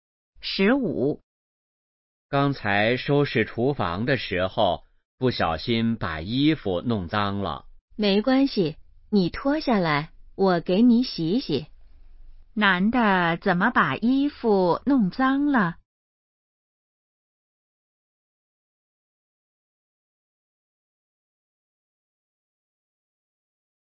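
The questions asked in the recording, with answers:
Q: 男的怎么把衣服弄脏了?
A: 收拾厨房时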